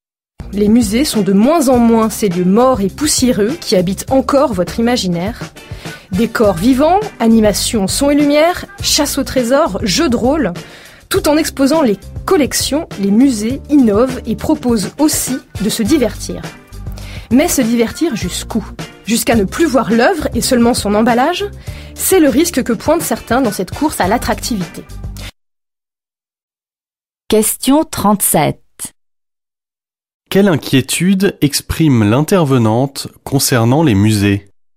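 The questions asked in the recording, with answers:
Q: Quelle inquiétude exprime l'intervenante concernant les musées ?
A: Qu'à force de vouloir divertir, on ne voie plus l'œuvre mais seulement son emballage.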